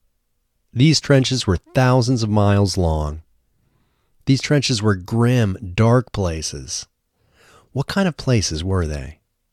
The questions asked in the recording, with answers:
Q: What kind of places were they?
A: They were grim, dark places.